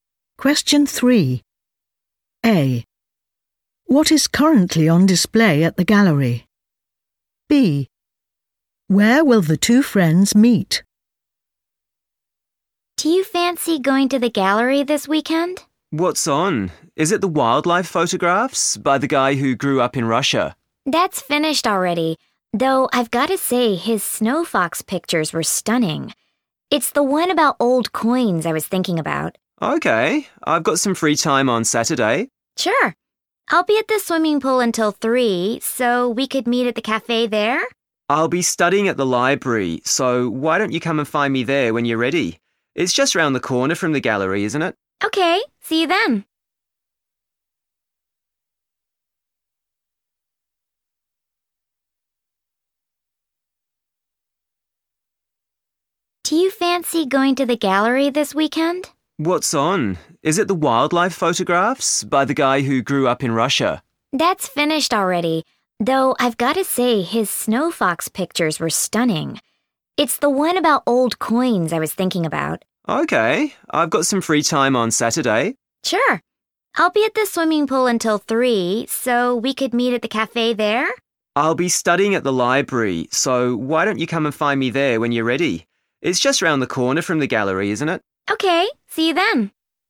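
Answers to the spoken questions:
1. old coins
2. at the library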